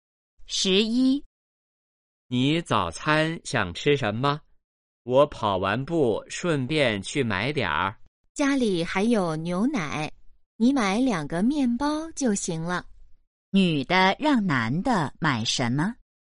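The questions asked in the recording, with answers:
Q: 女的让男的买什么?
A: 面包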